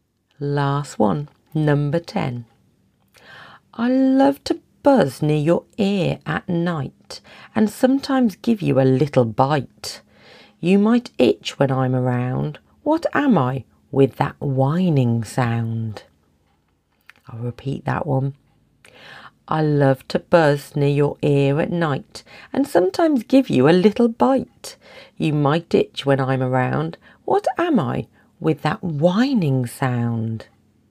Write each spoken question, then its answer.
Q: What am I with that whining sound?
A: The answer was a mosquito.